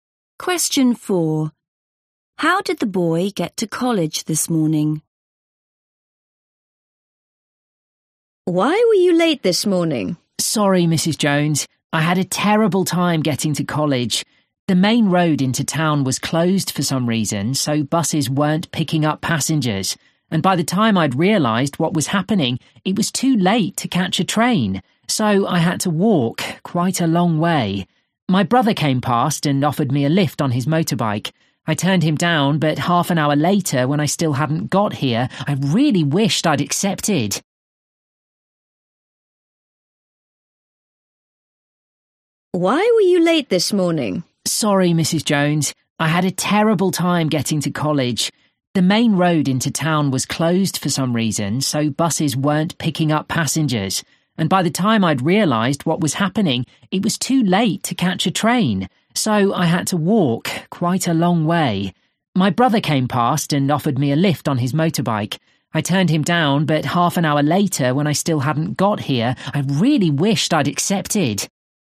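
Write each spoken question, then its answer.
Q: How did the boy get to college this morning?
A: he walked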